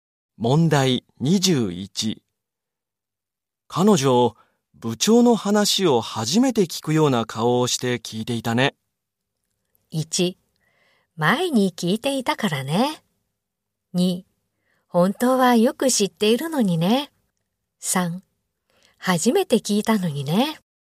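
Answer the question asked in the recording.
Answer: 2: 本当はよく知っているのにね。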